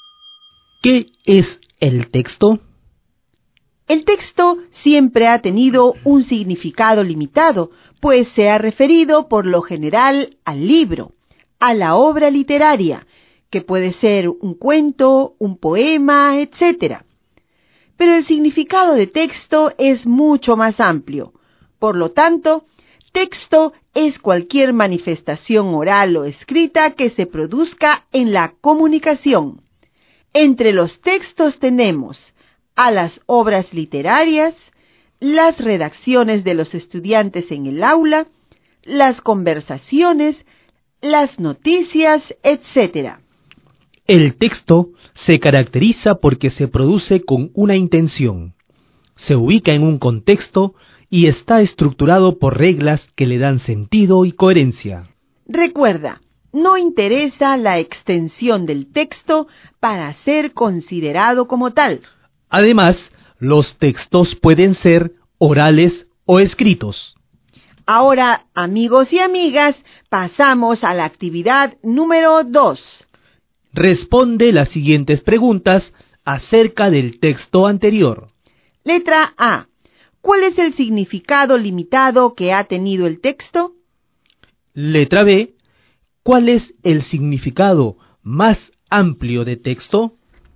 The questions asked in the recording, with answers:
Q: ¿Cuál es el significado limitado que ha tenido el texto?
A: el texto siempre ha tenido un significado muy limitado, porque siempre se ha pensado que cuando hablamos de texto solamente nos estamos refiriendo al libro

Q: ¿Cuál es el significado más amplio de texto?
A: que el texto también puede ser cualquier manifestación oral o escrita que se produzca en la comunicación.